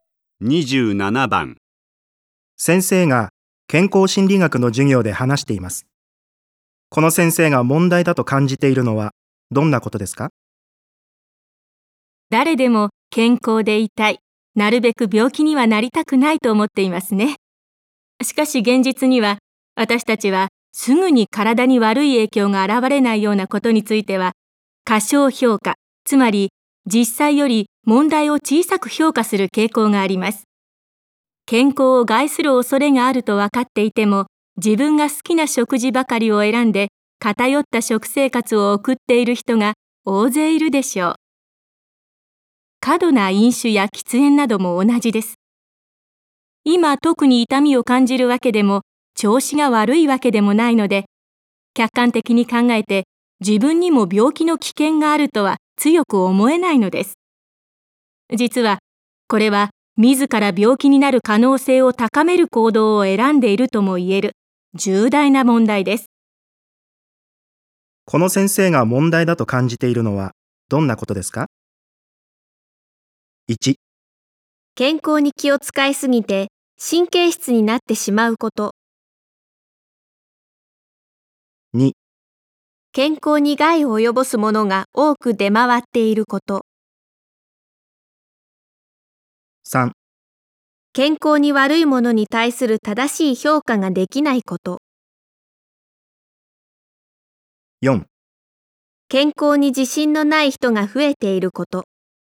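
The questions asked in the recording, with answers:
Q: この先生が問題だと感じているのはどんなことですか?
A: 3: 健康に悪いものに対する正しい評価ができないこと。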